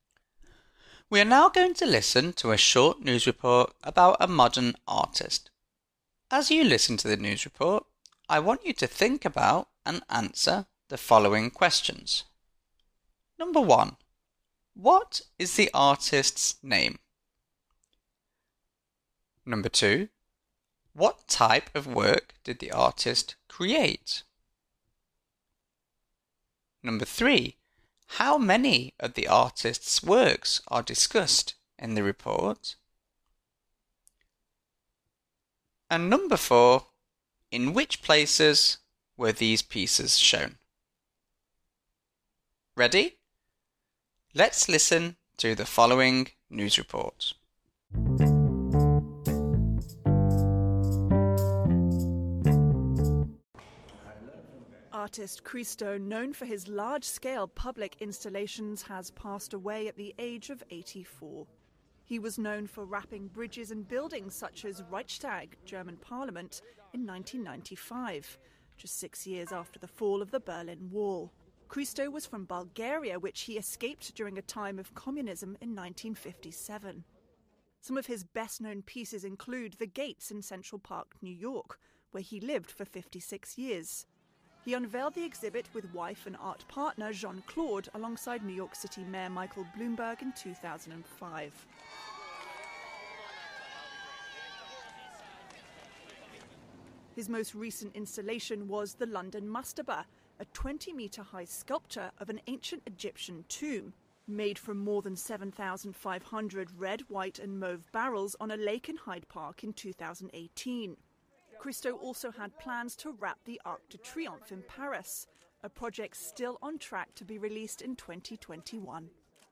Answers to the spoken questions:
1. the artist's name is Christo
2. Christo, along with his wife, was known for producing large-scale art installations, wrapping bridges and buildings
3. in the report, four pieces of art are discussed
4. including Berlin, Germany, New York, London, and Paris